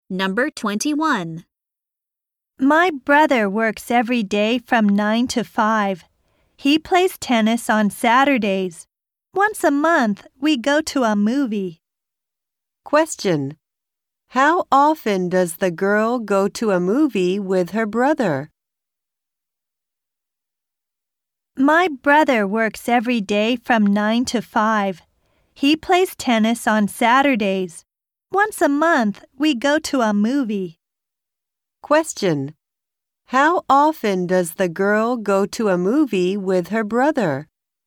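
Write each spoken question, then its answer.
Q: How often does the girl go to a movie with her brother?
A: Once a month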